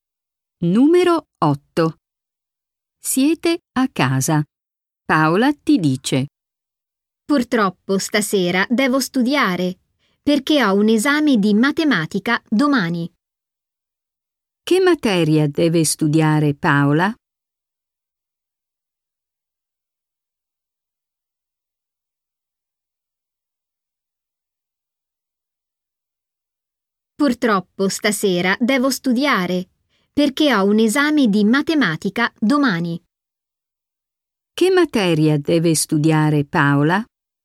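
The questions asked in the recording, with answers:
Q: Che materia deve studiare Paola?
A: Matematica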